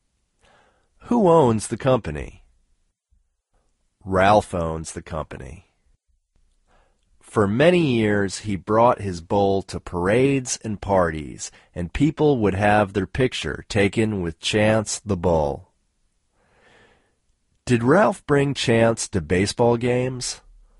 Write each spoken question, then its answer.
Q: Did Ralph bring Chance to baseball games?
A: No, Ralph didn't bring Chance to baseball games.